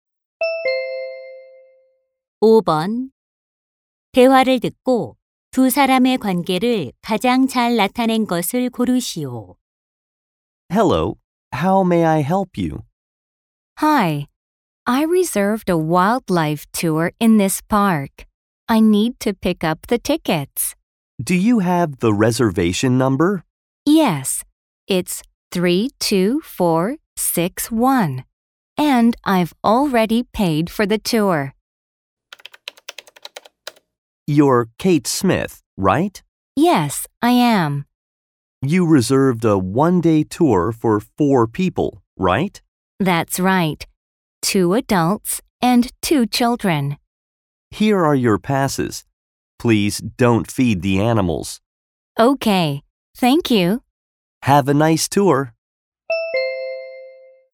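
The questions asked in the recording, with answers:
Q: 대화를 듣고 두 사람의 관계를 가장 잘 나타낸 것을 고르시오.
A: 공원 직원 - 관광객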